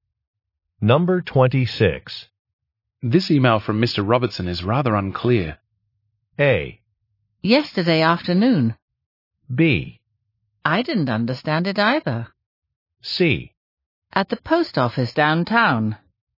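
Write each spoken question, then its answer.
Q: This email from Mr. Robertson is rather unclear.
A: B: I didn't understand it either.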